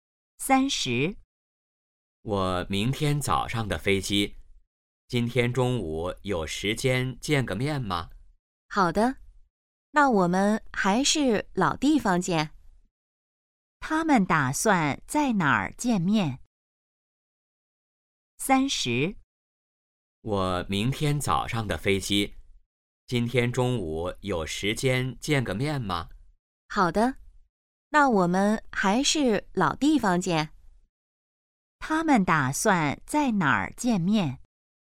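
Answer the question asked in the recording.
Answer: 老地方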